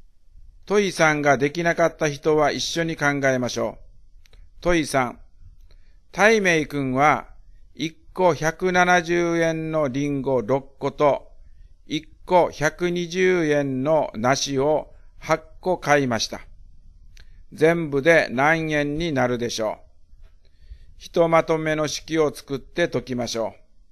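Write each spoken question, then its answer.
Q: 全部で何円になるでしょう?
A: 1980円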